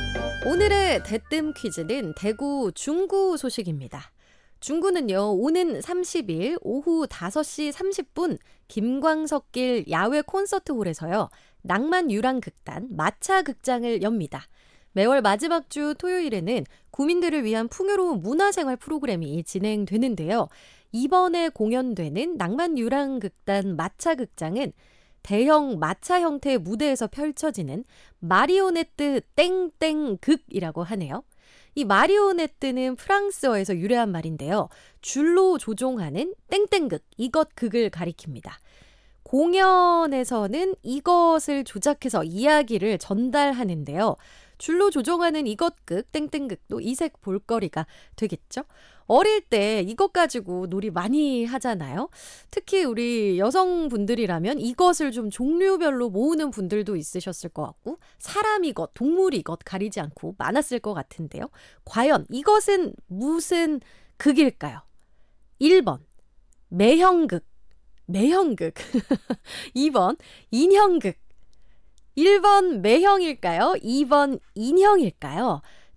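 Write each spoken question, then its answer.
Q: 과연 이것은 무슨 극일까요?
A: 2: 인형극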